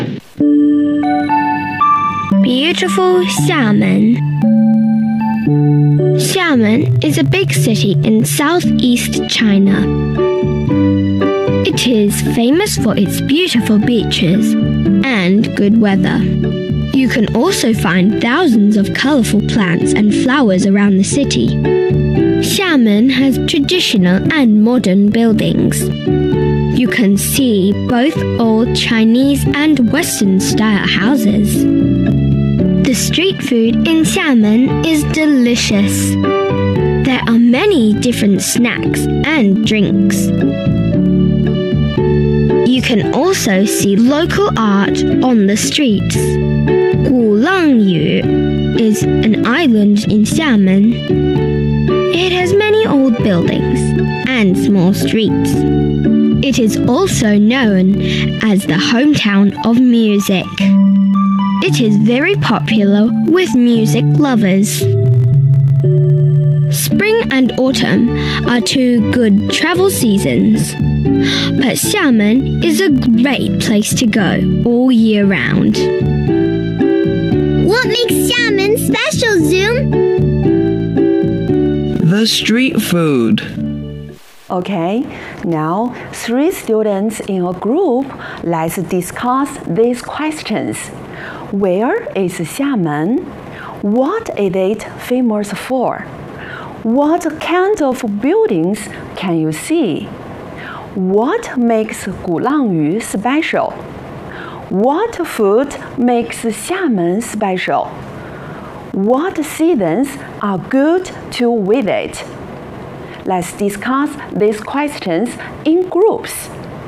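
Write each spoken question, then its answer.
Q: Where is Xiamen?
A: In southeast China

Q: What is it famous for?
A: Its beautiful beaches and good weather

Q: What kind of buildings can you see?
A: Traditional and modern buildings, old Chinese and Western style houses

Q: What makes Gulangyu special?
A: It has many old buildings and small streets and is known as the hometown of music

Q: What food makes Xiamen special?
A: Its delicious street food, with many snacks and drinks

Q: What seasons are good to visit?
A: Spring and autumn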